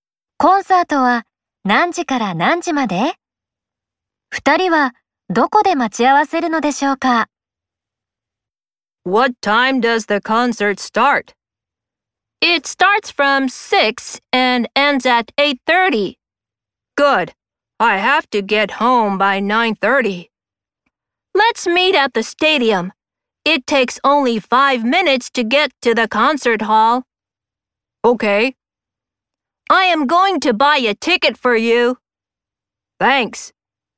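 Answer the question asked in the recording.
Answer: 6時から8時30分まで。スタジアムで待ち合わせる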